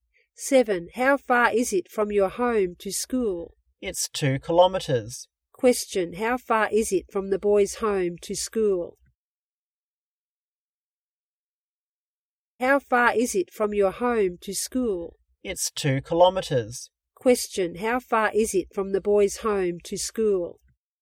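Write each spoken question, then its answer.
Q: how far is it from the boys' home to school?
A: 2 kilometers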